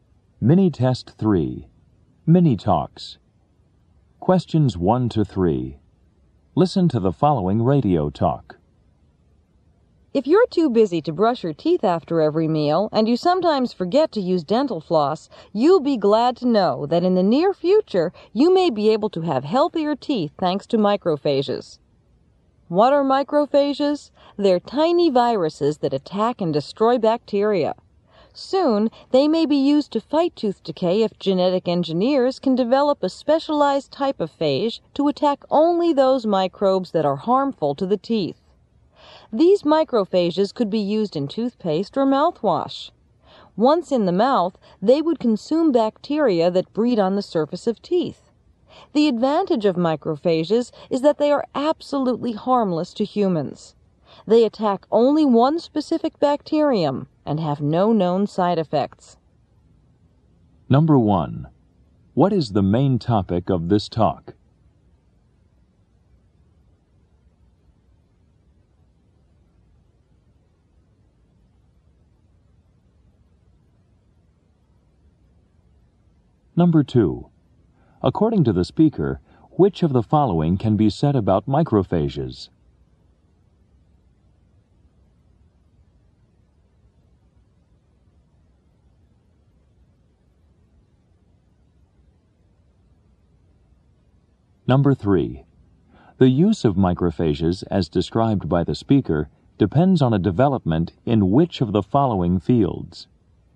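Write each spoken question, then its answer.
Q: What is the main topic of this talk?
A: Using microphages (tiny viruses) to fight tooth decay

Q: The use of microphages, as described by the speaker, depends on a development in which of the following fields?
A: Genetic engineering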